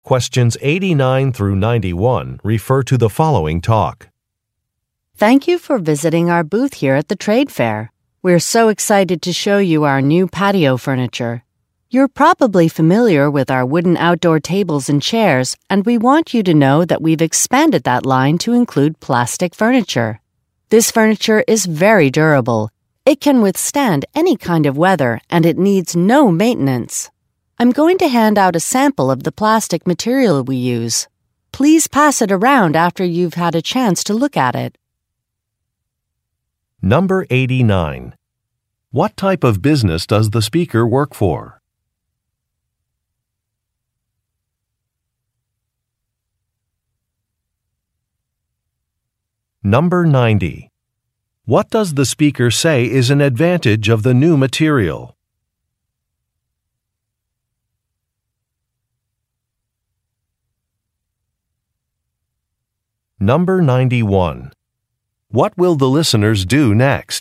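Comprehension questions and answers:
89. What type of business does the speaker work for?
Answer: A furniture manufacturer

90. What does the speaker say is an advantage of the new material?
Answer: It is durable.

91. What will the listeners do next?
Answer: Look at a sample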